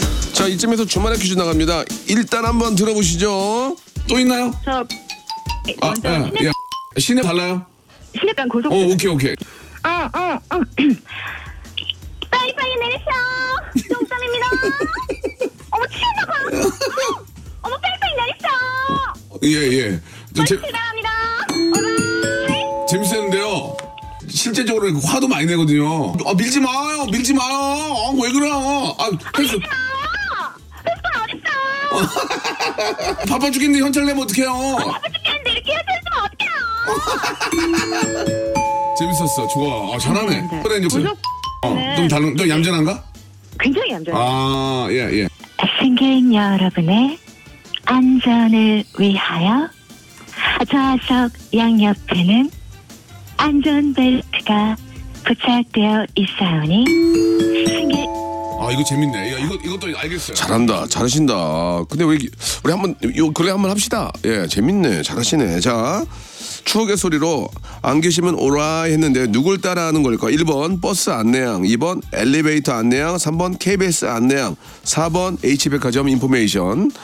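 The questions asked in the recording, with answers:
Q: 추억의 소리로 안 계시면 오라 했는데 누굴 따라 하는 걸까?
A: 1: 버스 안내양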